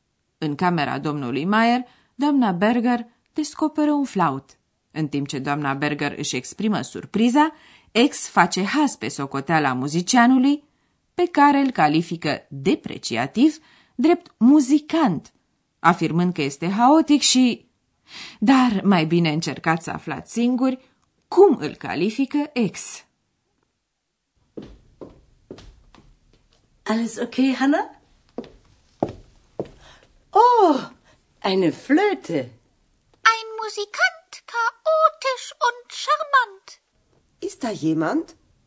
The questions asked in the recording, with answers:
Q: Dar mai bine încercați să aflați singuri cum îl califică ex.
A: Ex spune că muzicianul e charmant, adică fermecător, încântător.